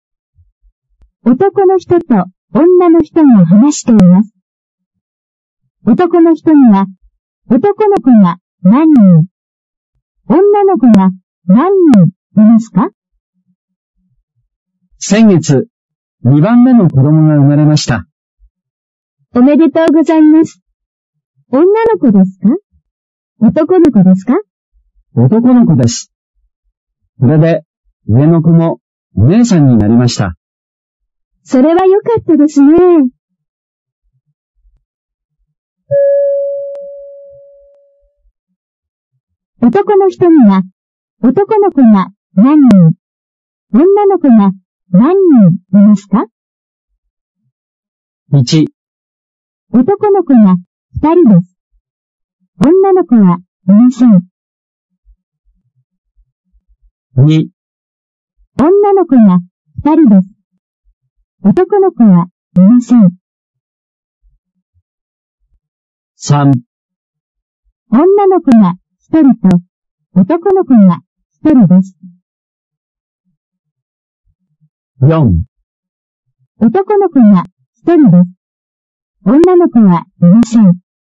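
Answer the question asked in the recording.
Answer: 3: 女の子が1人と男の子が1人です。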